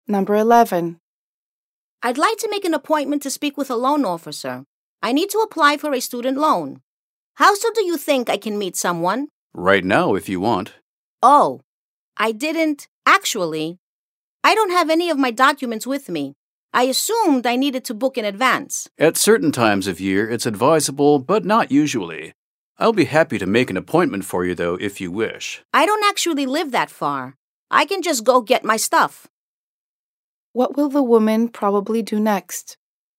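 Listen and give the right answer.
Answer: Go home to get her documents and come back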